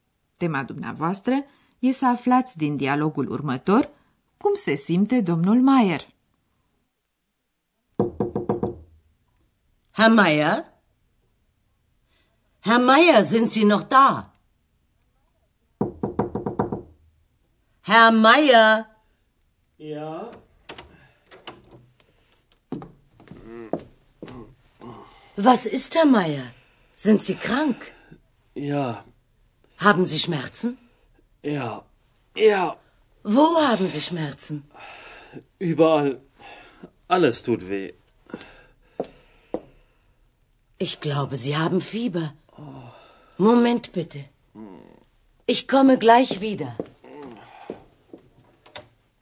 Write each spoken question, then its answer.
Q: Tema dumneavoastră e să aflați din dialogul următor cum se simte domnul Maier.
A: v-ați dat cu siguranță seama că nu se simte bine. E bolnav.